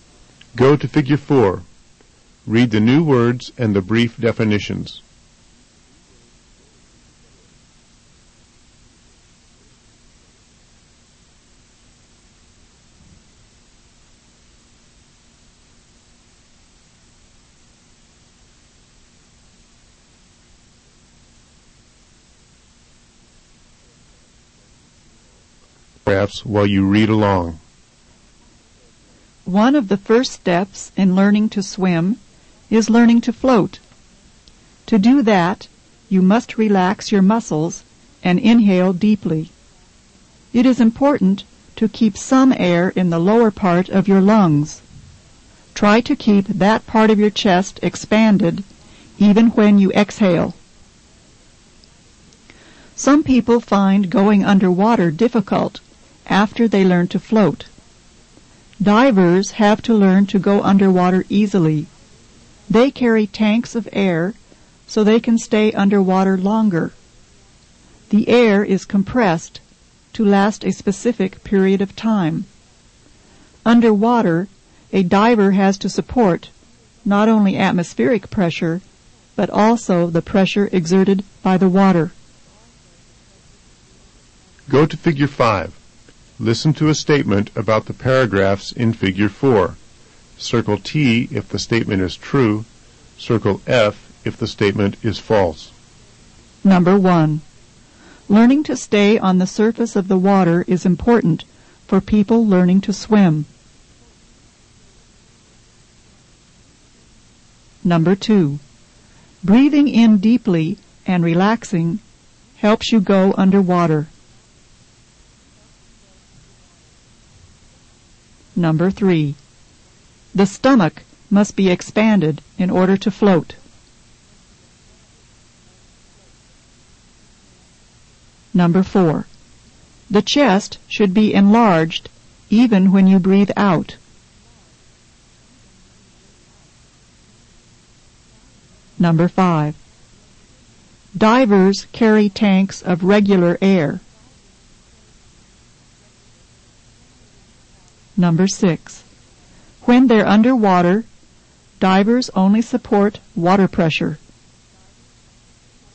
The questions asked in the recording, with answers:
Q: Learning to stay on the surface of the water is important for people learning to swim.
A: Number one is true.

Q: Breathing in deeply and relaxing helps you go underwater.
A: Number two is false.

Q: The stomach must be expanded in order to float.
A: Number three is false.

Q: The chest should be enlarged even when you breathe out.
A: Number four is true.

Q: Divers carry tanks of regular air.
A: Number five is false.

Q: When they're underwater, divers only support water pressure.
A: Number six is also false.